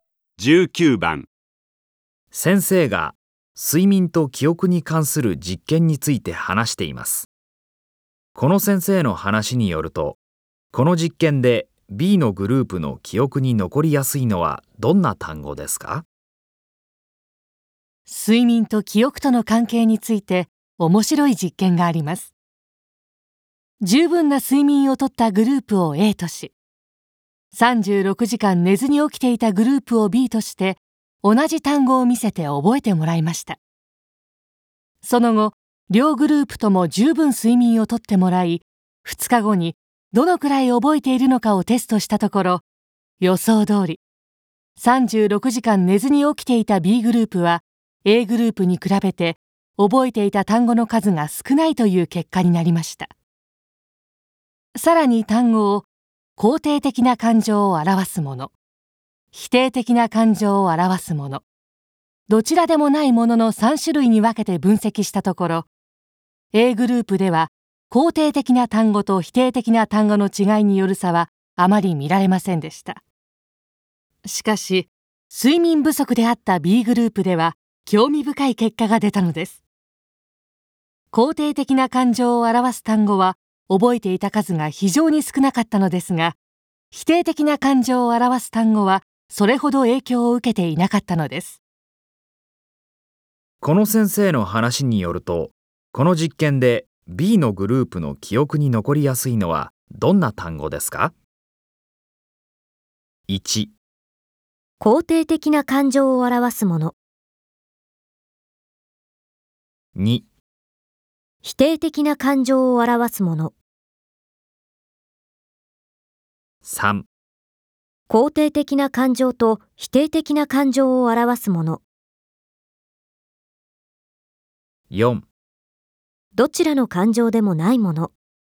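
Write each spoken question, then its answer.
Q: この先生の話によると、この実験で B のグループの記憶に残りやすいのはどんな単語ですか?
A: 2: 否定的な感情を表すもの。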